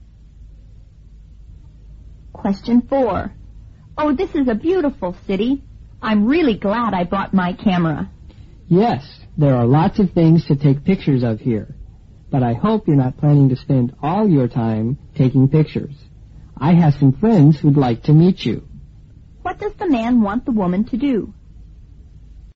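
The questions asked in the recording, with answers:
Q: What does the man want the woman to do?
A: Meet his friends instead of spending all her time taking pictures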